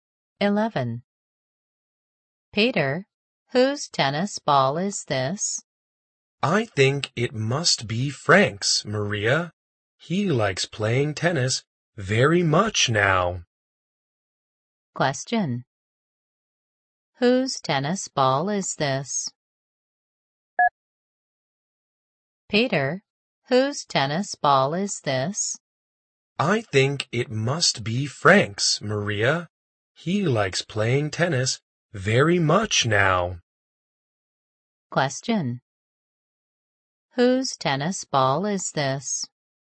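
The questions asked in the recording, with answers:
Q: Whose tennis ball is this?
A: Frank's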